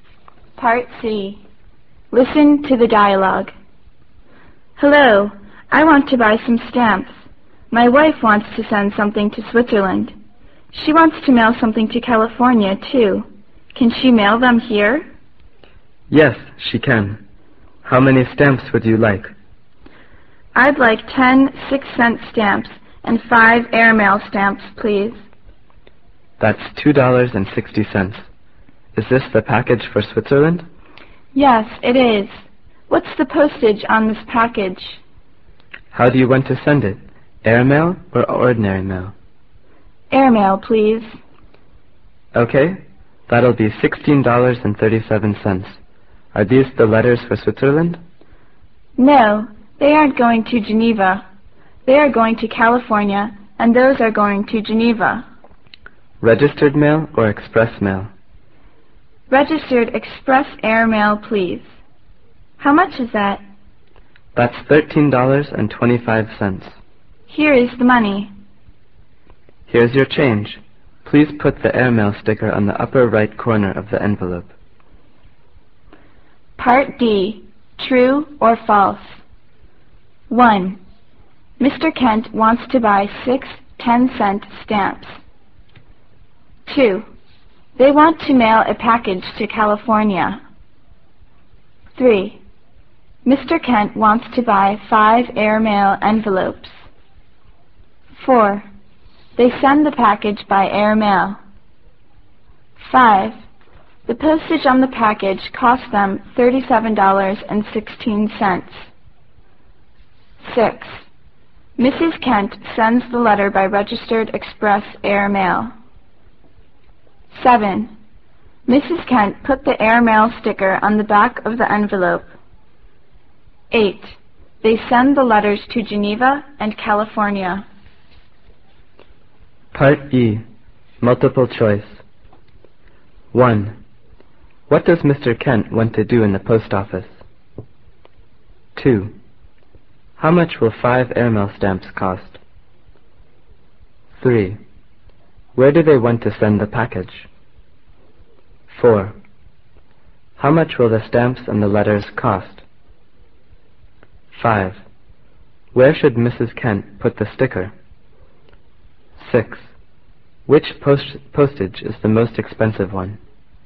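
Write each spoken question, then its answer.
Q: Mr. Kent wants to buy 6 10-cent stamps.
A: False

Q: They want to mail a package to California.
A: False

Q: Mr. Kent wants to buy 5 airmail envelopes.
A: False

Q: They send the package by airmail.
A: True

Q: The postage on the package cost them $37.16.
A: False

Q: Mrs. Kent put the airmail sticker on the back of the envelope.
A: False

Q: They send the letters to Geneva and California.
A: True

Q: What does Mr. Kent want to do in the post office?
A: Buy some stamps

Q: Where do they want to send the package?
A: To Switzerland

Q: Where should Mrs. Kent put the sticker?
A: On the upper right corner of the envelope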